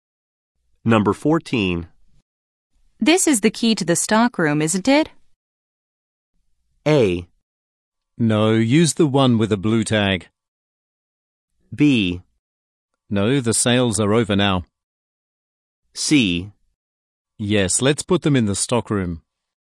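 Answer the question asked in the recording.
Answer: A: No, use the one with a blue tag.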